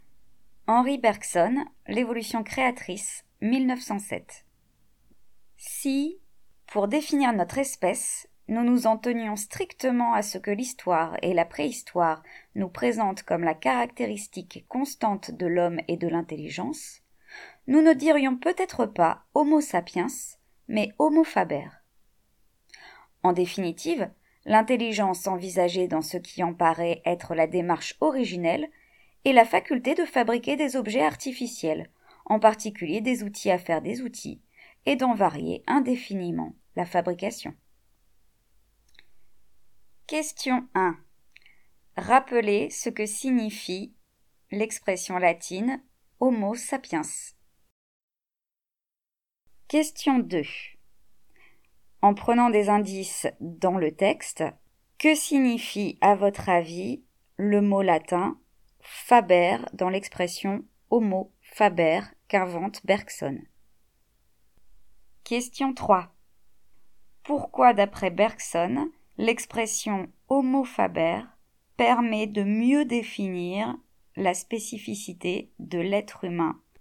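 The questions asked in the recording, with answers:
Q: En prenant des indices dans le texte, que signifie à votre avis le mot latin « faber » dans l'expression « homo faber » qu'invente Bergson ?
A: Celui qui fabrique (l'homme fabricant d'objets et d'outils)

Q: Pourquoi, d'après Bergson, l'expression « homo faber » permet de mieux définir la spécificité de l'être humain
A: Parce que la caractéristique constante de l'homme, c'est l'intelligence comme faculté de fabriquer des objets artificiels, en particulier des outils à faire des outils, et d'en varier indéfiniment la fabrication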